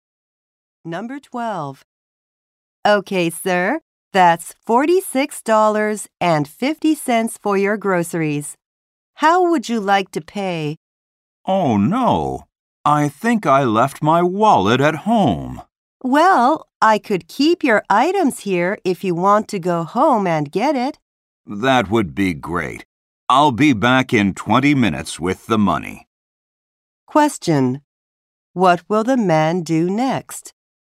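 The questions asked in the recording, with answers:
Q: What will the man do next?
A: Go home to get his wallet.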